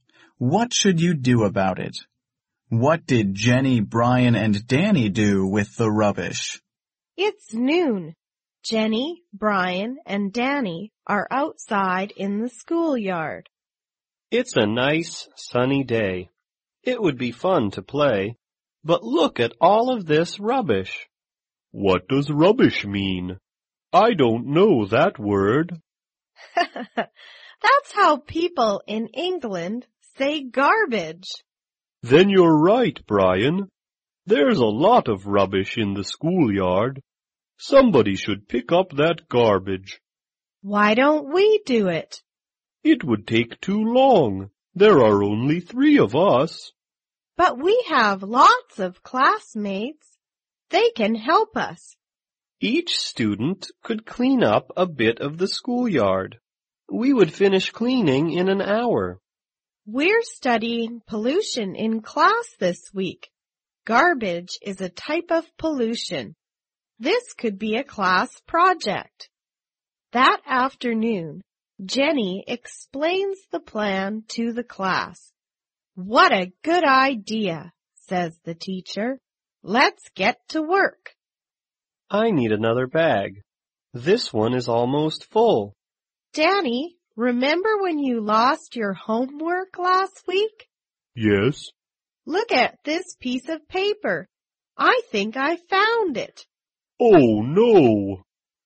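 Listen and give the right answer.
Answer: They cleaned it up / picked it up with their classmates as a class project.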